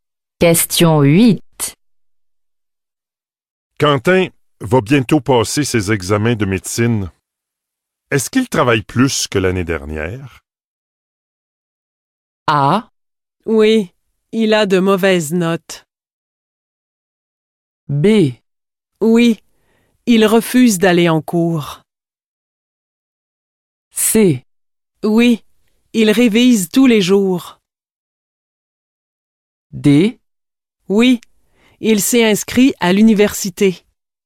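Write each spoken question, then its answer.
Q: Est-ce qu'il travaille plus que l'année dernière?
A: C: Oui, il révise tous les jours.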